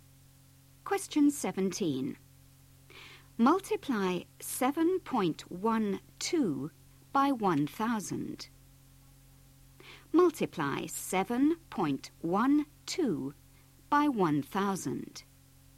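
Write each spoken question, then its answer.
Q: Multiply 7.12 by 1,000.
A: 7120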